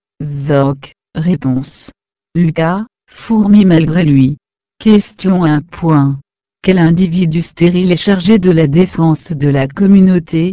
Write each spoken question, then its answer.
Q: Quel individu stérile est chargé de la défense de la communauté?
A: soldat.